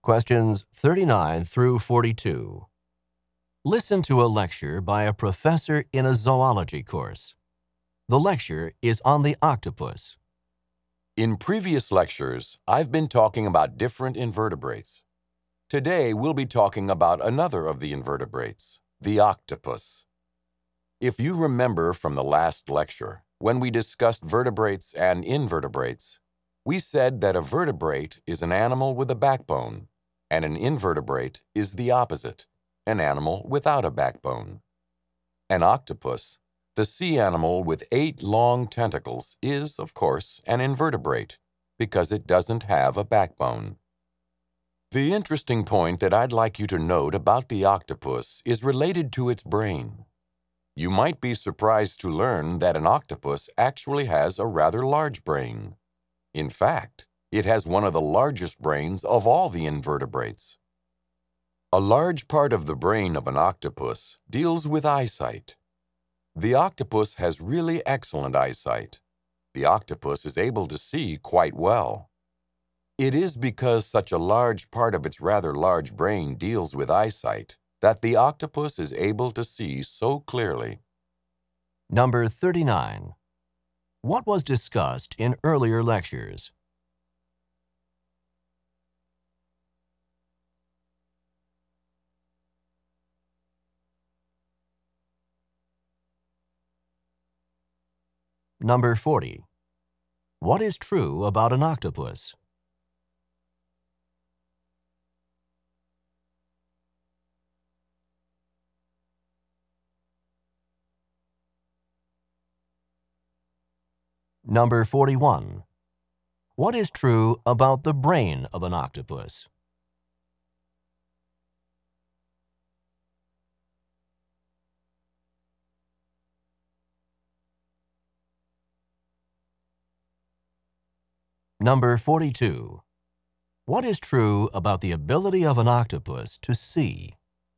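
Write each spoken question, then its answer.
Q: What was discussed in earlier lectures?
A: Different invertebrates

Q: What is true about the ability of an octopus to see?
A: It sees very well, since a large part of its brain deals with eyesight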